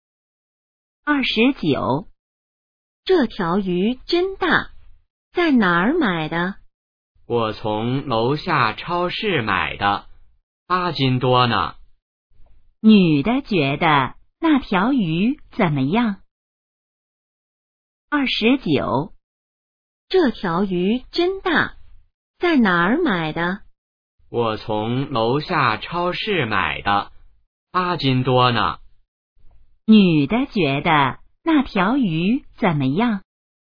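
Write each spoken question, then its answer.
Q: 女的觉得那条鱼怎么样?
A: 很大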